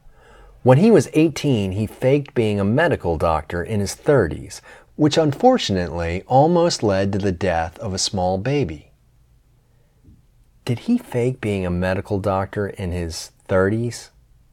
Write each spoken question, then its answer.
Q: Did he fake being a medical doctor in his 30s?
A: Yes, he faked being a medical doctor in his 30s.